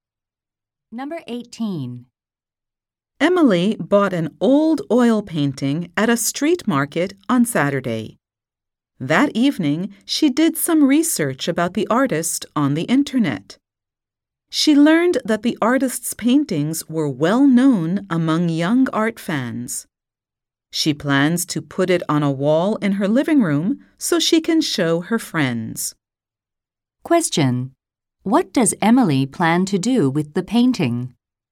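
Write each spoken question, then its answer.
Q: What does Emily plan to do with the painting?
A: Put it on her living room wall to show her friends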